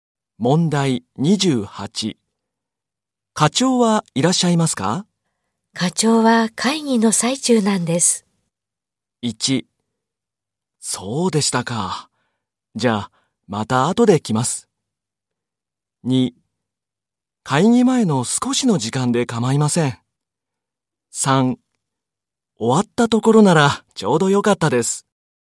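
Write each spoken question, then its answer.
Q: 課長はいらっしゃいますか?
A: 3: そうでしたか。じゃあ、また後で来ます。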